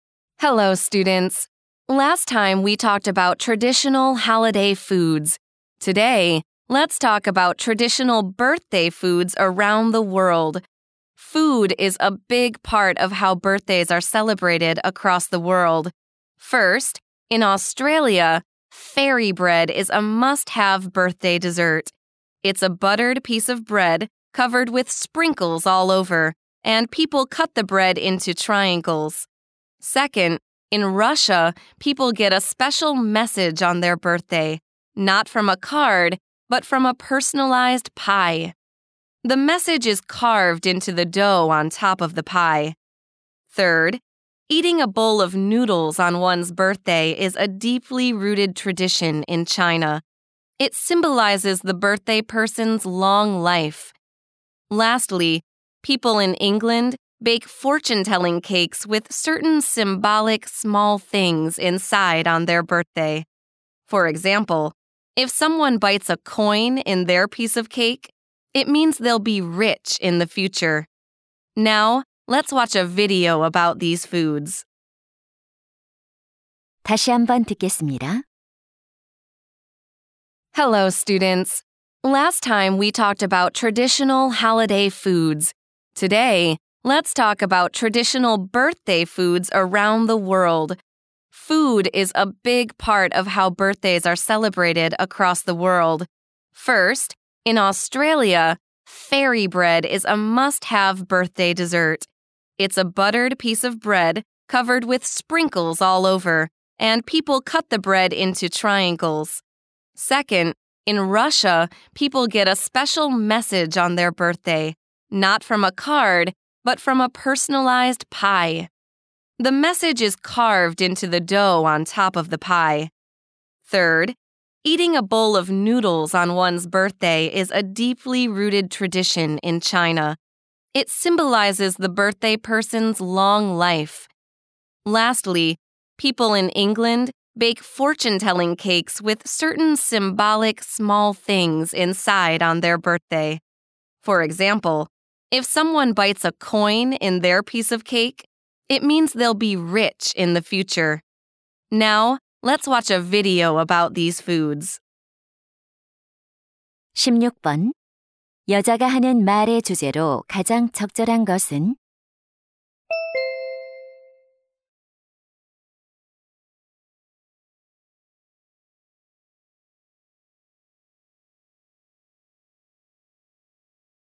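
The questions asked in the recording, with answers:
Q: 여자가 하는 말의 주제로 가장 적절한 것은?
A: 세계 여러 나라의 전통 생일 음식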